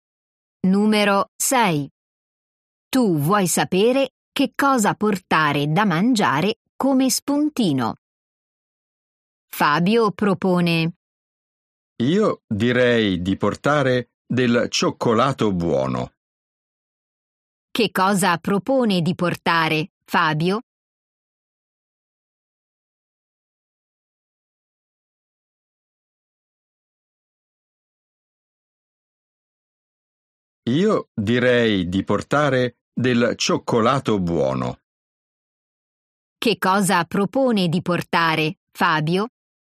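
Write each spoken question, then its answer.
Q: Che cosa propone di portare Fabio?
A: Del cioccolato buono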